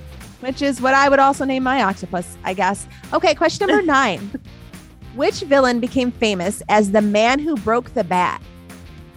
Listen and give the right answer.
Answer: It's gonna be Bane, actually.